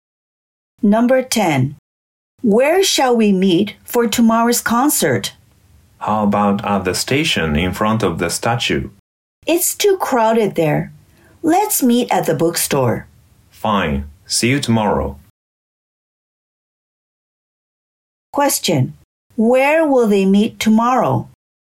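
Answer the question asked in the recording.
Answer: At the bookstore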